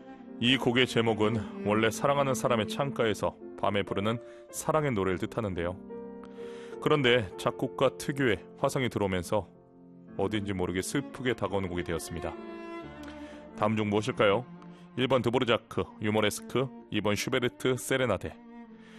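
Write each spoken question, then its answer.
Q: 다음 중 무엇일까요? 1번 드보르자크, 유머레스크, 2번 슈베르트 세레나데.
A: 2: 슈베르트 세레나데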